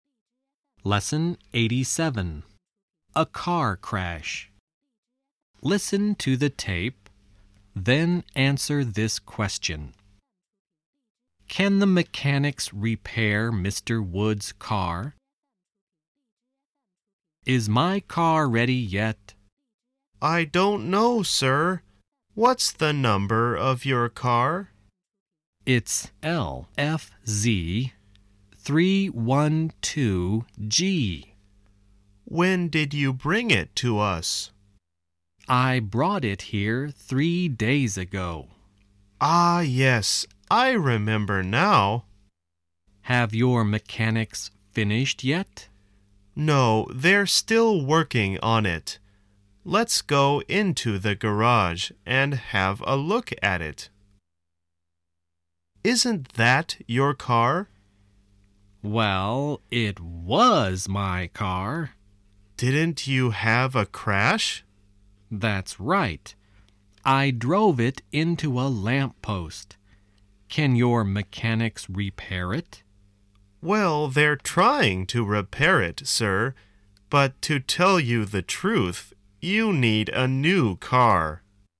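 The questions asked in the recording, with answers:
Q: Can the mechanics repair Mr. Wood's car?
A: No, probably not; they're trying, but he needs a new car.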